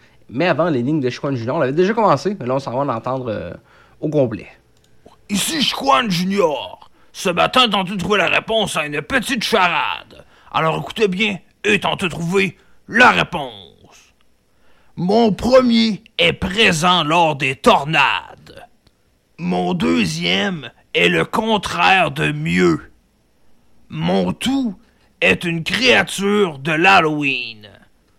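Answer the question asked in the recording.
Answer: vampire (vent + pire)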